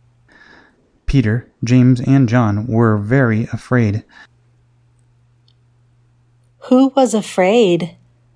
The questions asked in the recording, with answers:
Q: Who was afraid?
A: Peter, James, and John were afraid.